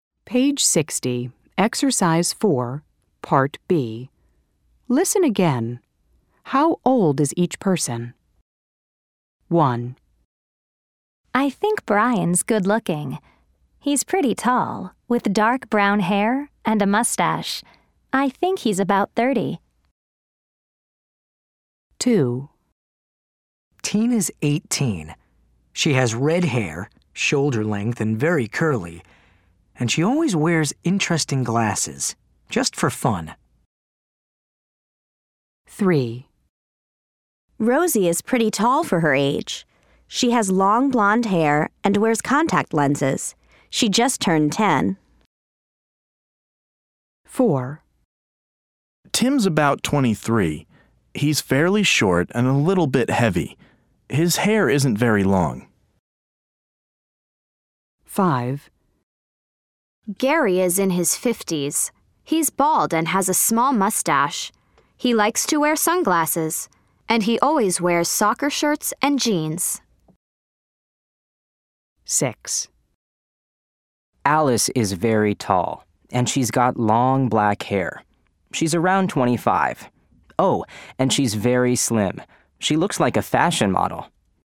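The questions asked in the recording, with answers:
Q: How old is each person?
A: Brian: about 30

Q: How old is each person?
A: Tina: 18

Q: How old is each person?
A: Rosie: 10

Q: How old is each person?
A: Tim: about 23

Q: How old is each person?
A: Gary: in his 50s

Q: How old is each person?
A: Alice: around 25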